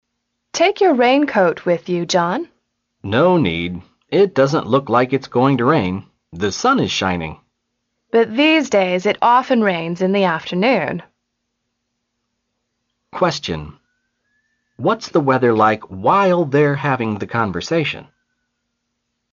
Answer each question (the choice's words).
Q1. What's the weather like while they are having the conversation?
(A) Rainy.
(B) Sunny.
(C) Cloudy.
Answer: Sunny.